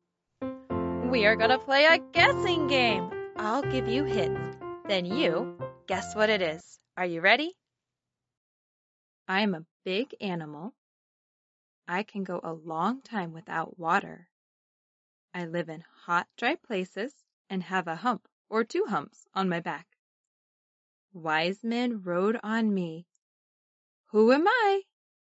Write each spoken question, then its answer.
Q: Who am I?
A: Camel.